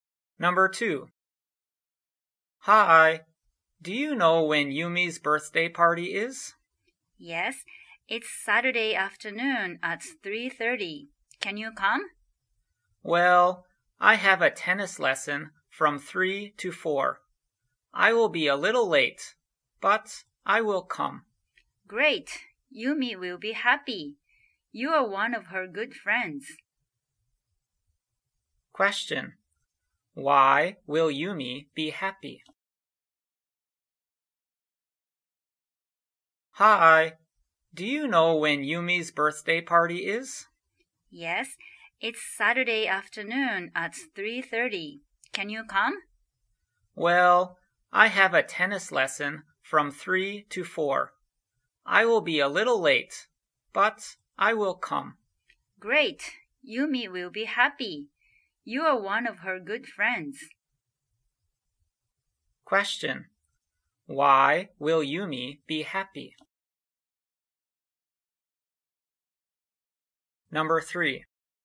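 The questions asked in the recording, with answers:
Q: Why will Yumi be happy?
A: Because one of her good friends will come to her party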